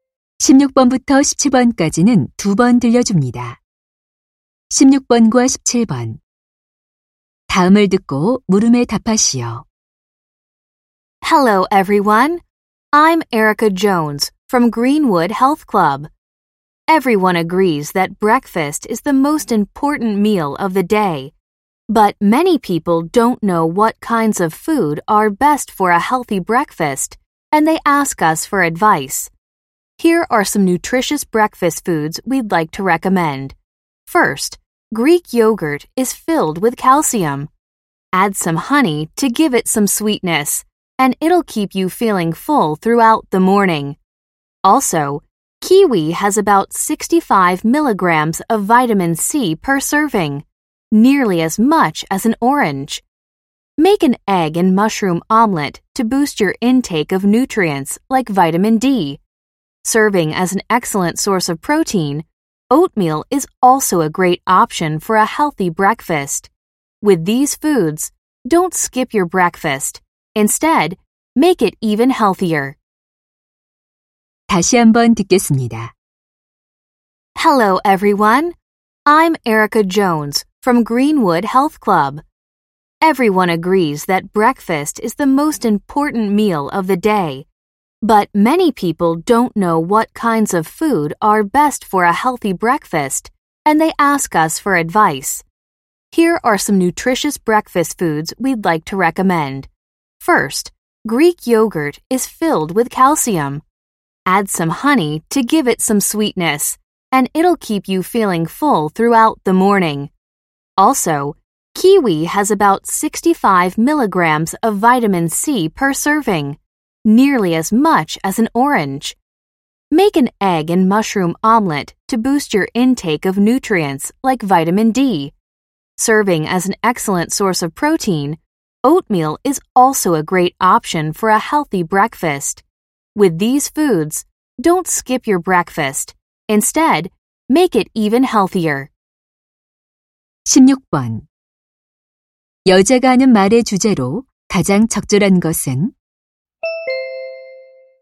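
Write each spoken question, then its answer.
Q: 여자가 하는 말의 주제로 가장 적절한 것은?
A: 건강한 아침 식사를 위한 음식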